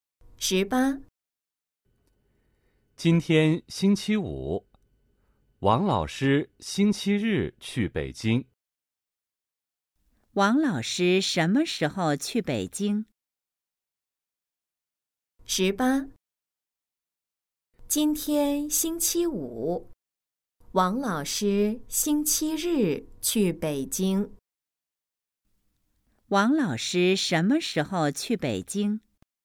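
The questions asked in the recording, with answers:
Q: 王老师什么时候去北京?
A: 星期日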